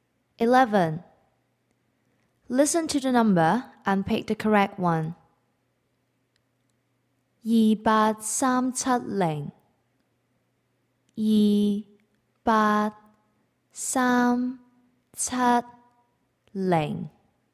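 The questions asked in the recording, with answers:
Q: Listen to the number and pick the correct one.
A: 28370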